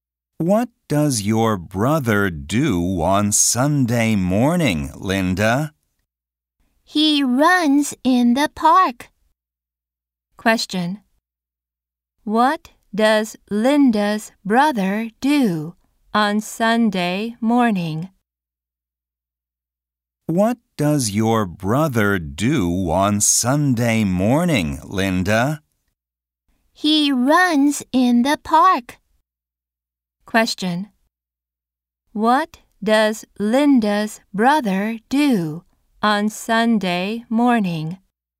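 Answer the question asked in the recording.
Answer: He runs in the park.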